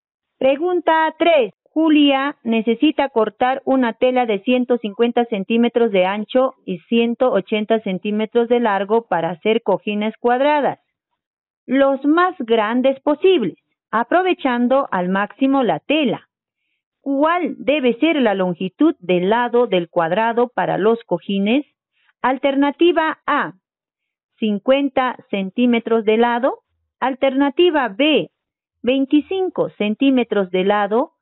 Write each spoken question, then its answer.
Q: ¿Cuál debe ser la longitud del lado del cuadrado para los cojines?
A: La alternativa C.